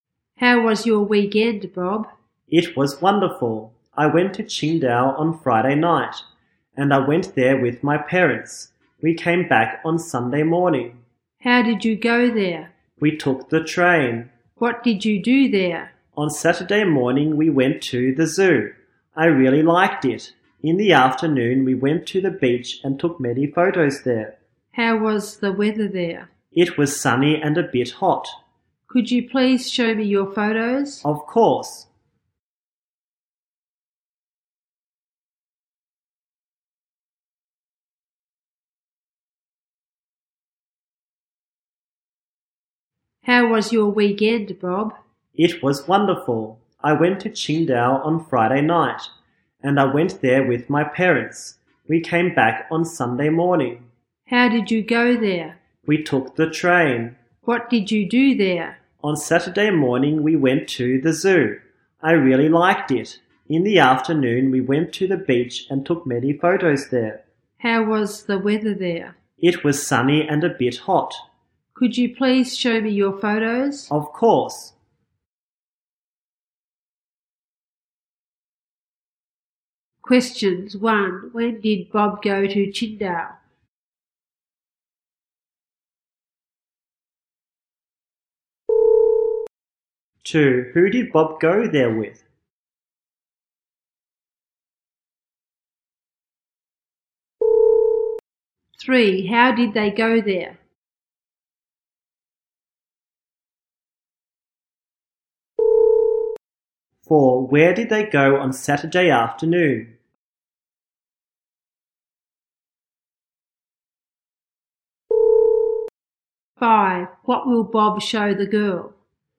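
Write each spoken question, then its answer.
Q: When did Bob go to Qingdao?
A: On Friday night

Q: Who did Bob go there with?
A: His parents

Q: How did they go there?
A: By train

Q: Where did they go on Saturday afternoon?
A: The beach

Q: What will Bob show the girl?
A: His photos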